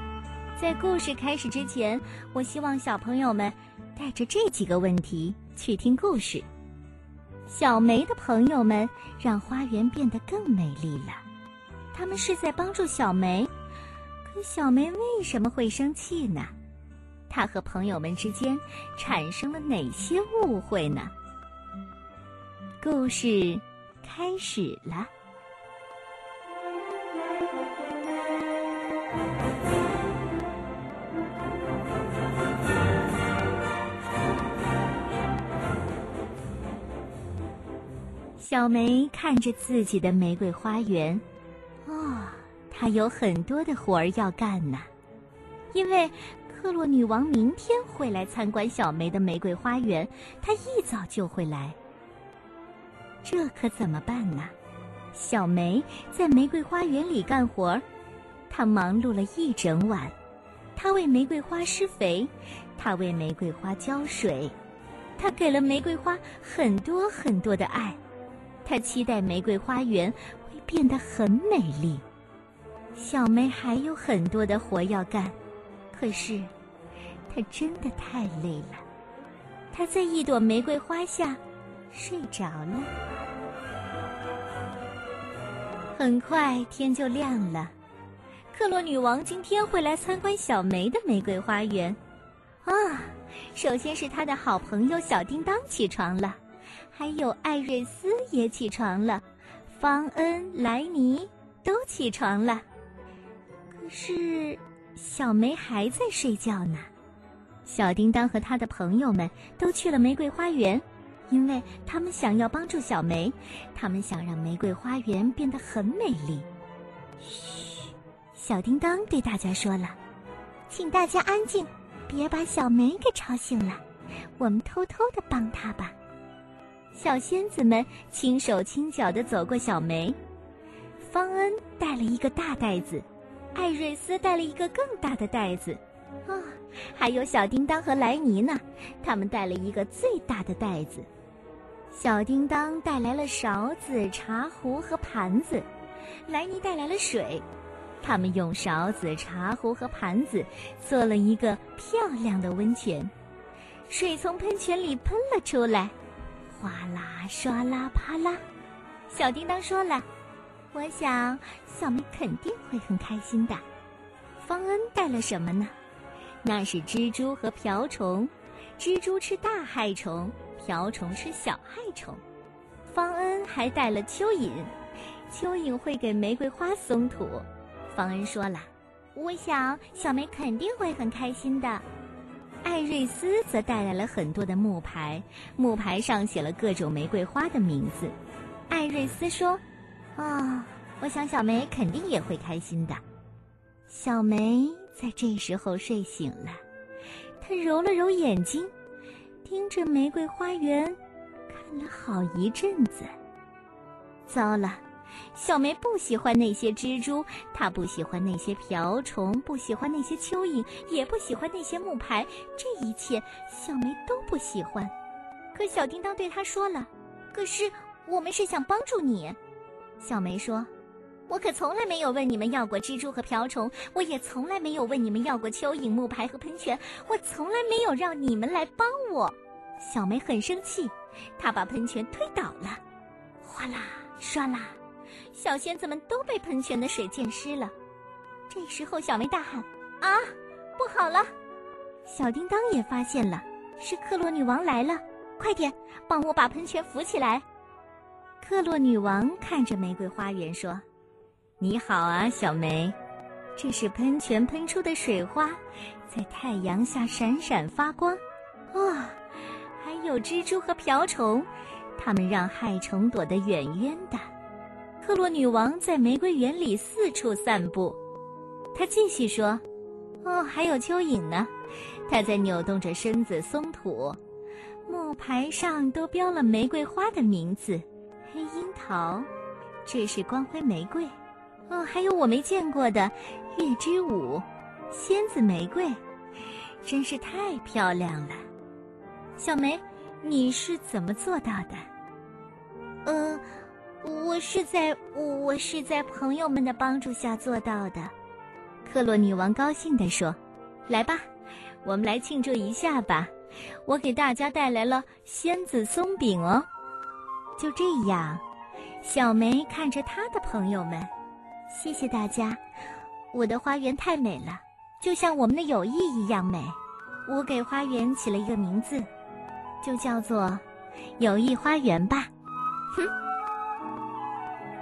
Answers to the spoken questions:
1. 但是小梅睡醒之后却以为朋友们是在给她添乱,因此很生气。
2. 朋友们是想在小梅睡着的时候悄悄地来帮忙,但是小梅睡醒之后却以为朋友们是在给她添乱